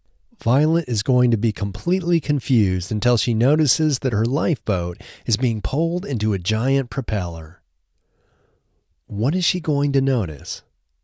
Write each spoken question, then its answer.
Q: What is she going to notice?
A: She's going to notice that her lifeboat is being pulled into a giant propeller.